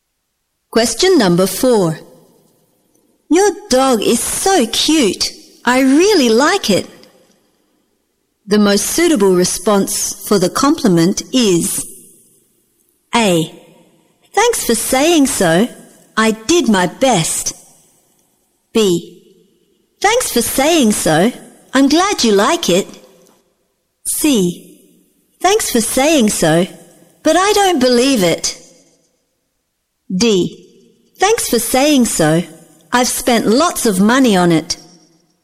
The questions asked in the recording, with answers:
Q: Your dog is so cute. I really like it. The most suitable response for the compliment is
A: B. Thanks for saying so. I'm glad you like it.